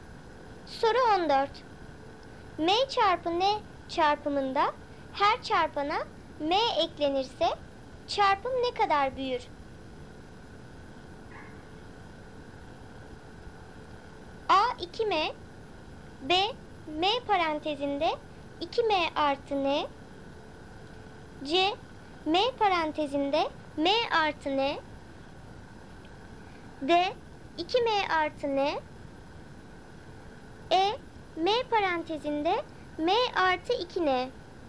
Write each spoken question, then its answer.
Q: Soru 14. M çarpı N çarpımında her çarpana M eklenirse çarpım ne kadar büyür?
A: Doğru cevap B M parantezinde 2M artı N.